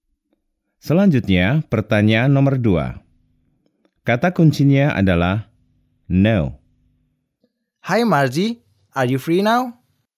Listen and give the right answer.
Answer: No, I am not.